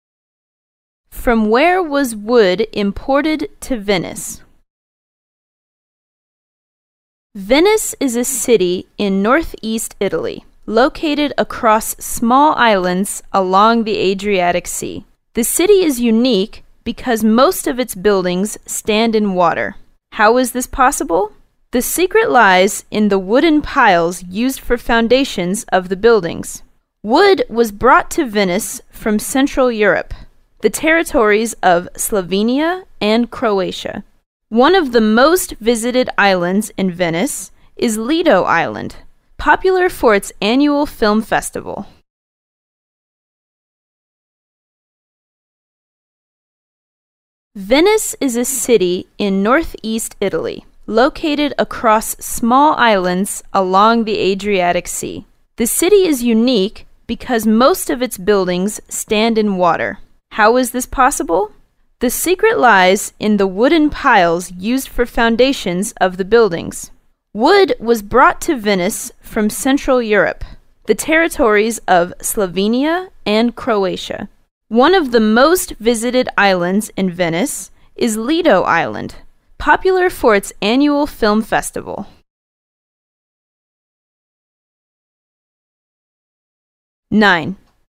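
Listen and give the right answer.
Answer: Central Europe (Slovenia and Croatia)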